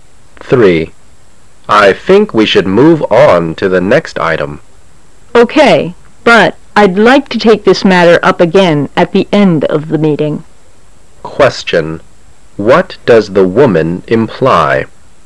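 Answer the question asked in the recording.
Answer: She wants to discuss the matter again at the end of the meeting

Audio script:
[解析] M: I think we should move on to the next item. W: OK, but I'd like to take this matter up again at the end of the meeting. Q: What does the woman imply?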